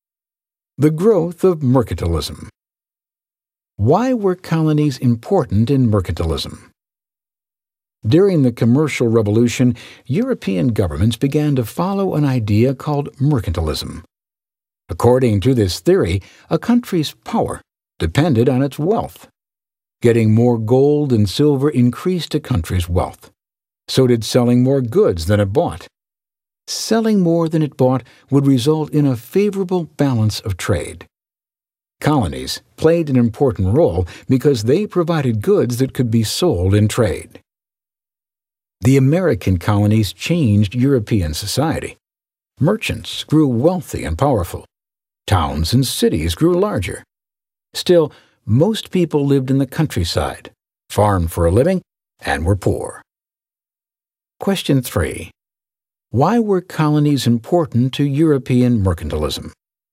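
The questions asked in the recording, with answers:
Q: Why were colonies important to European mercantilism?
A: They provided goods that could be sold in trade, which increased a country's wealth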